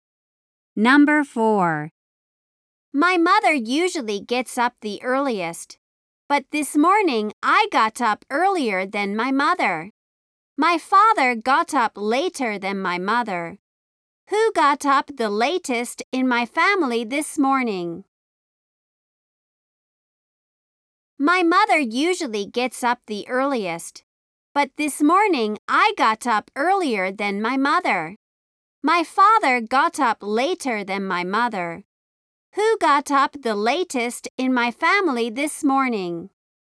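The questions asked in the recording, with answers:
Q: Who got up the latest in my family this morning?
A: My father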